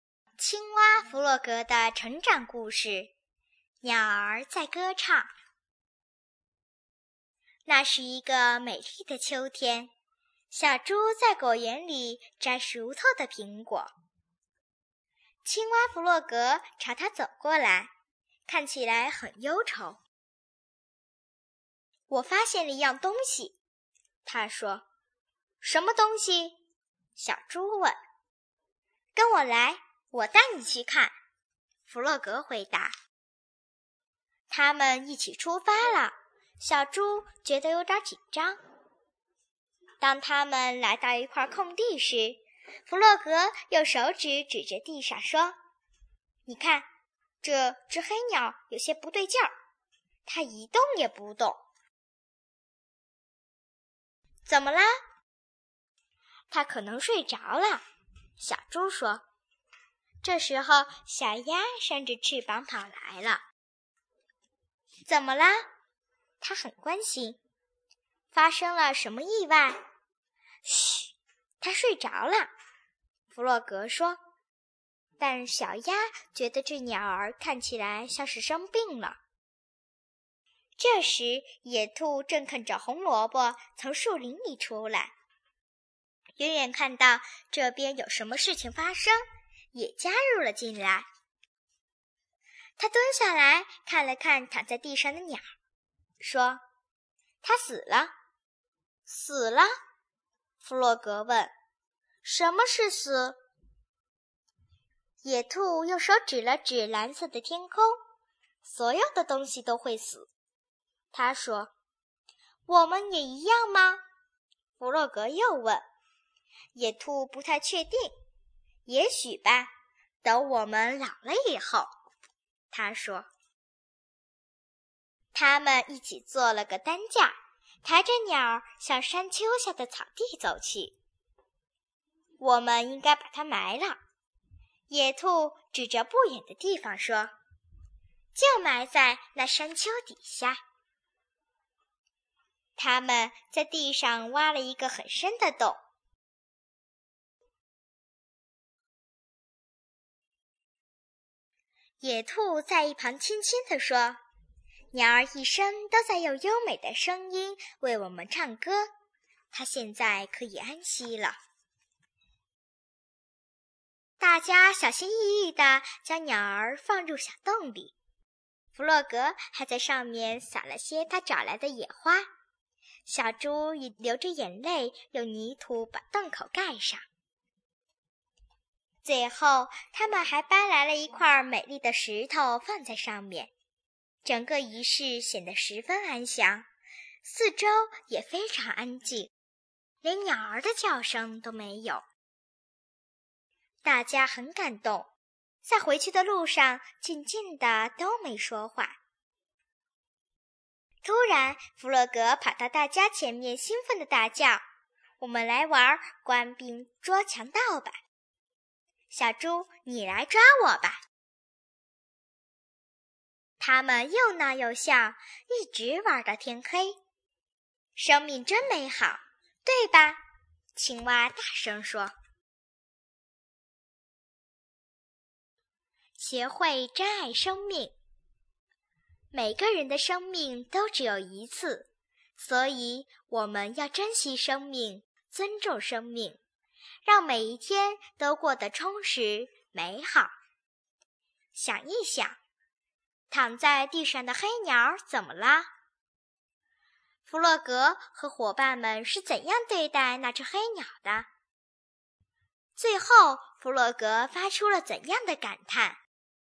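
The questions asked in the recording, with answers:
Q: 躺在地上的黑鸟怎么了?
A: 它死了

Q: 弗洛格和伙伴们是怎样对待那只黑鸟的?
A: 他们做了担架把它抬到山丘下埋了,撒上野花,盖上泥土,放上一块美丽的石头

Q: 最后,弗洛格发出了怎样的感叹?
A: 生命真美好,对吧?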